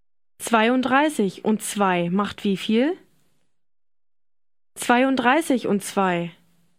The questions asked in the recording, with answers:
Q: 32 und 2 macht wie viel?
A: 34.